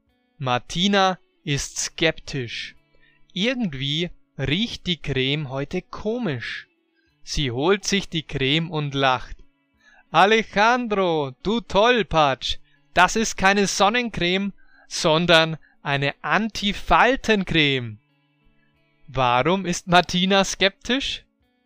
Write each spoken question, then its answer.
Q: Warum ist Martina skeptisch?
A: Weil die Creme heute irgendwie komisch riecht.